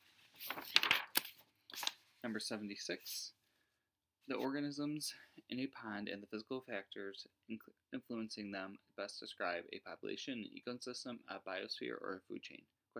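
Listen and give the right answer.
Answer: an ecosystem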